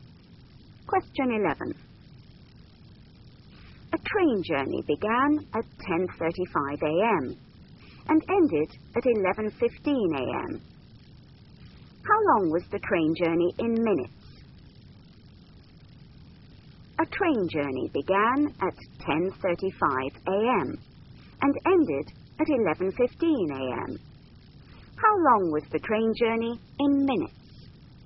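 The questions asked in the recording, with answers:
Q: How long was the train journey in minutes?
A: 40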